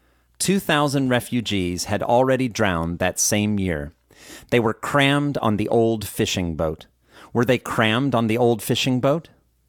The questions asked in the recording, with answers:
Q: Were they crammed on the old fishing boat?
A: Yes, they were crammed on the old fishing boat.